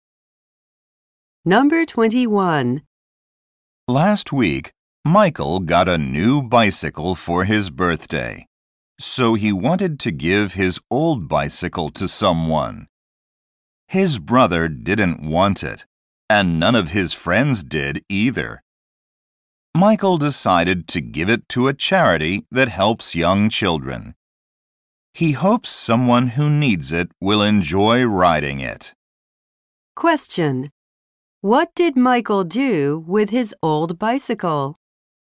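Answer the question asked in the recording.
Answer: He gave it to a charity that helps young children.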